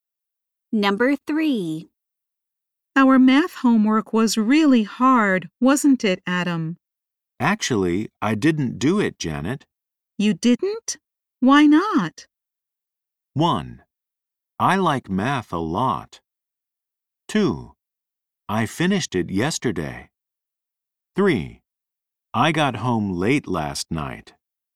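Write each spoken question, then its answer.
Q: You didn't? Why not?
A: 3: I got home late last night.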